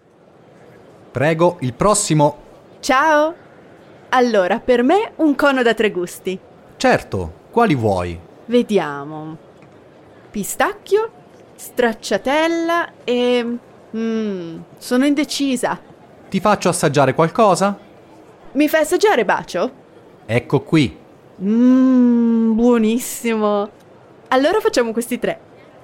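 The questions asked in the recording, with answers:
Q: Que sabores ela escolheu?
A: Pistache (pistacchio), stracciatella (flocos) e bacio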